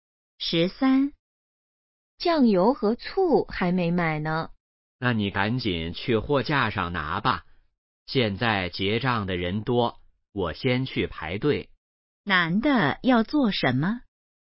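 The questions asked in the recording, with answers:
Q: 男的要做什么?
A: 去排队结账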